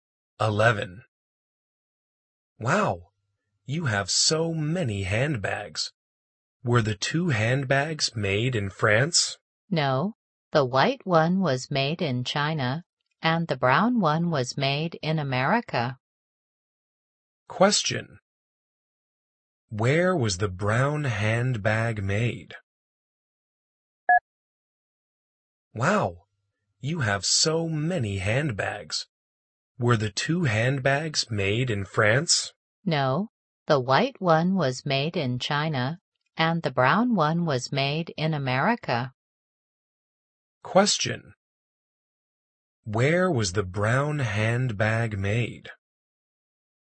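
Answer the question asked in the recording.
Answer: In America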